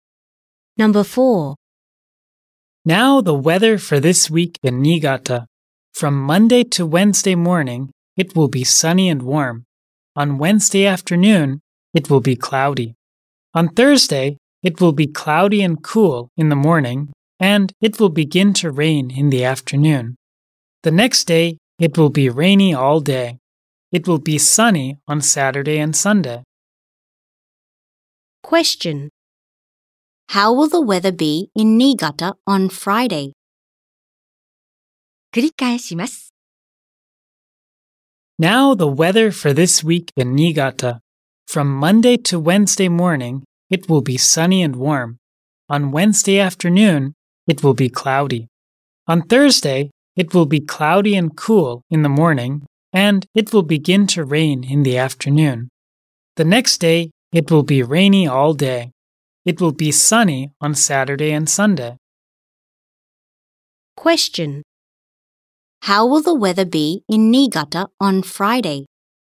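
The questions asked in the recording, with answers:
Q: How will the weather be in Niigata on Friday?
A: It will be rainy all day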